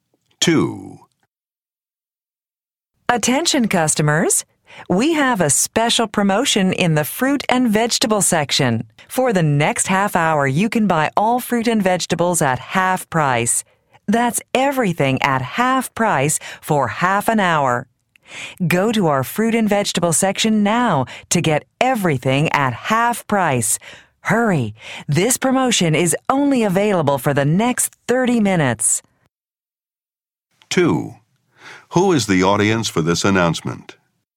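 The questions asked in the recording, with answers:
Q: Who is the audience for this announcement?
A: Shoppers in a store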